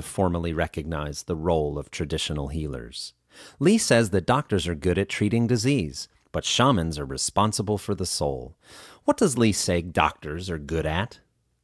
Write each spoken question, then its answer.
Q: What does Li say doctors are good at?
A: Li says doctors are good at treating disease.